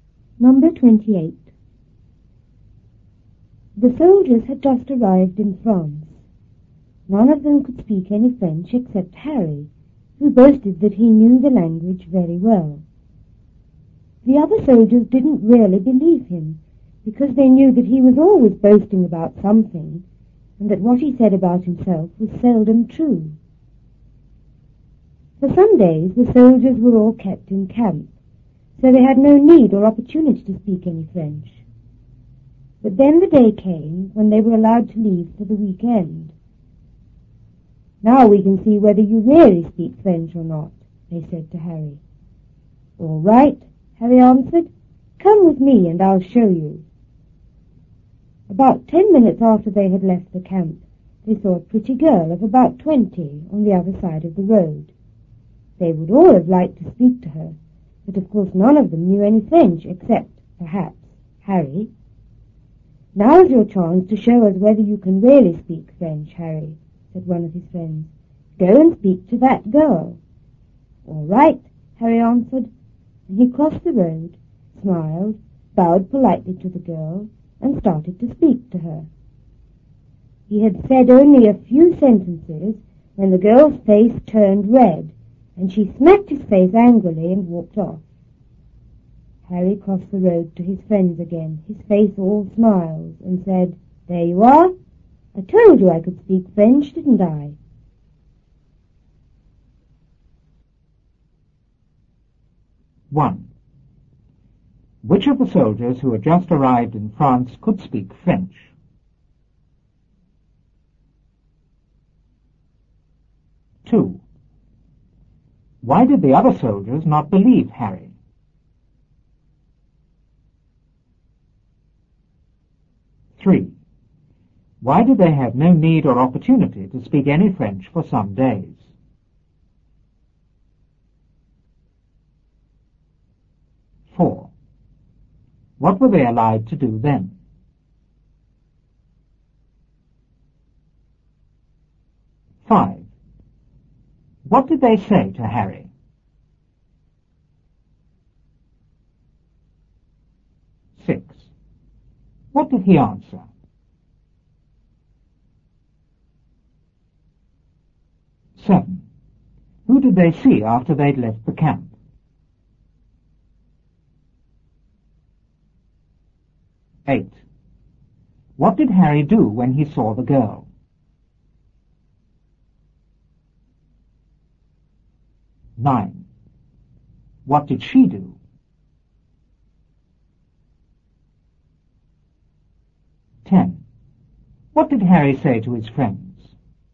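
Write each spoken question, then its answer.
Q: Which of the soldiers who had just arrived in France could speak French?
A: Only Harry (he boasted he could)

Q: Why did the other soldiers not believe Harry?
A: He was always boasting and what he said about himself was seldom true

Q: Why did they have no need or opportunity to speak any French for some days?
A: They were kept in camp

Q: What were they allowed to do then?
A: Leave the camp for the weekend

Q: What did they say to Harry?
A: Now we can see whether you really speak French or not

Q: What did he answer?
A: All right, come with me and I'll show you

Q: Who did they see after they'd left the camp?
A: A pretty girl of about 20

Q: What did Harry do when he saw the girl?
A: He crossed the road, smiled, bowed politely and spoke to her

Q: What did she do?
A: Her face turned red, she smacked his face angrily and walked off

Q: What did Harry say to his friends?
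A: There you are. I told you I could speak French, didn't I?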